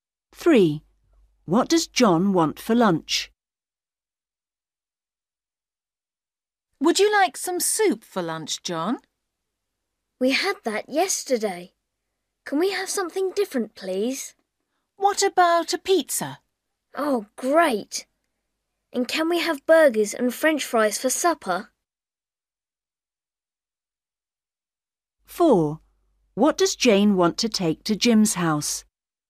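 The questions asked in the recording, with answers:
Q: What does John want for lunch?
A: Pizza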